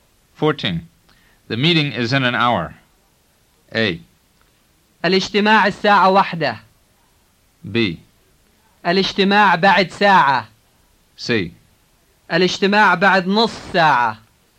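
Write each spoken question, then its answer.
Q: The meeting is in an hour.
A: B: الاجتماع بعد ساعة.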